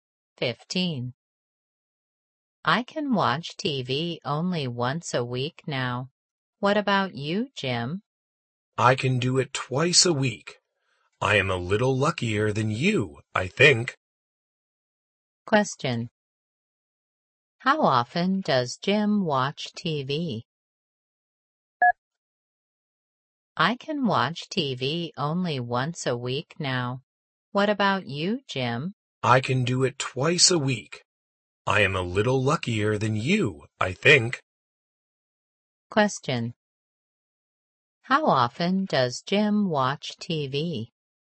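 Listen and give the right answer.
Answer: Twice a week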